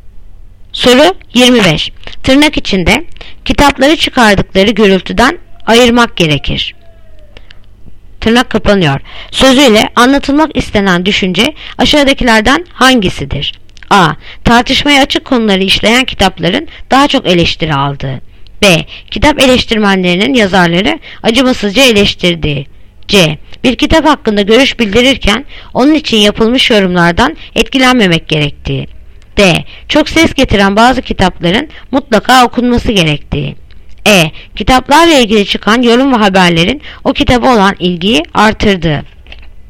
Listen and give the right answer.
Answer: Yanıt Ceyhan. Bir kitap hakkında görüş bildirirken onun için yapılmış yorumlardan etkilenmemek gerektiği.